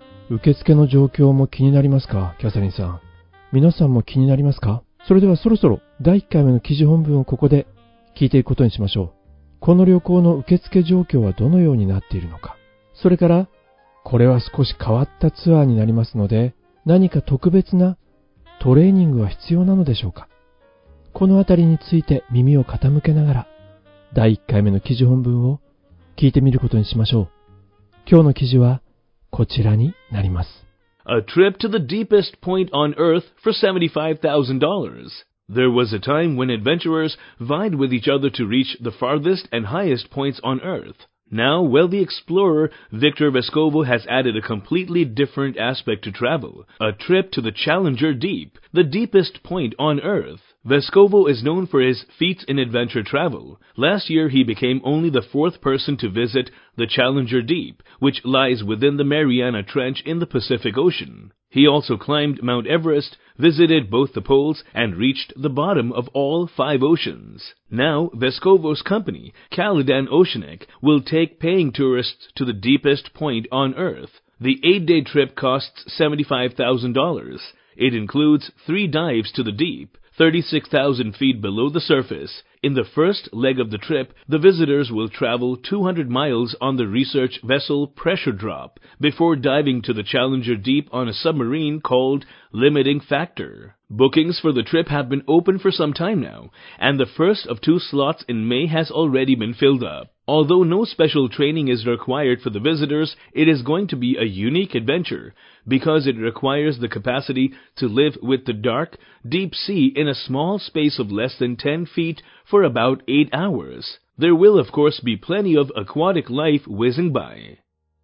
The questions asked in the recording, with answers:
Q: この旅行の受付状況はどのようになっているのか。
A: あら、すでに満員なのね。

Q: それからこれは少し変わったツアーになりますので何か特別なトレーニングは必要なのでしょうか。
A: 特別な訓練は require. 求めていないのね。